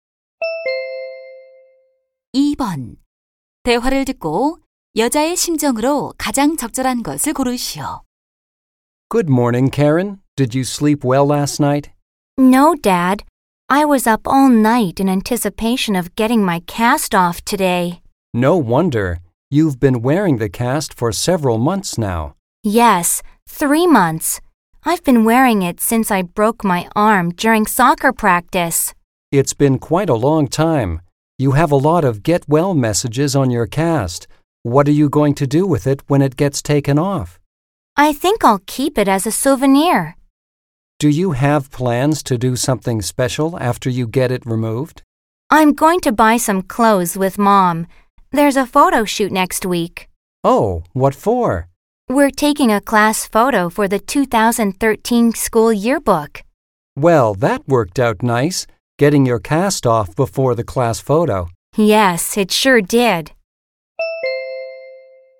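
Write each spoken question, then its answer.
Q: 대화를 듣고 여자의 심정으로 가장 적절한 것을 고르시오.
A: 기대되고 설렘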